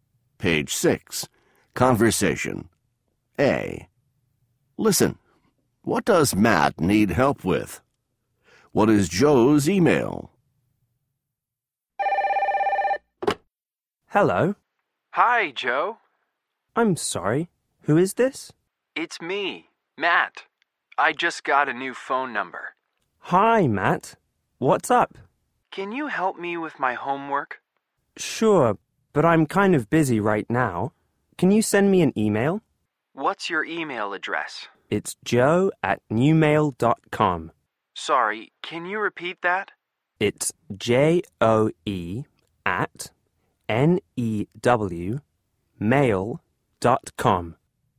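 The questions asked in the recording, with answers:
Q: What does Matt need help with?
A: His homework

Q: What is Joe's email?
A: joe@newmail.com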